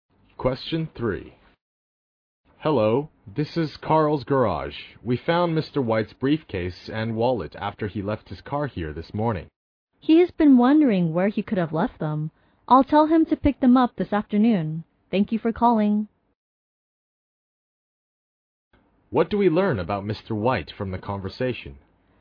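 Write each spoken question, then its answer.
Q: What do we learn about Mr. White from the conversation?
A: He left his briefcase and wallet at the garage.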